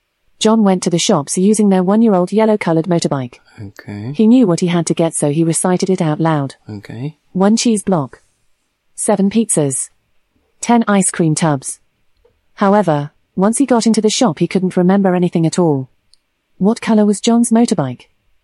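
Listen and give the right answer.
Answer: Yellow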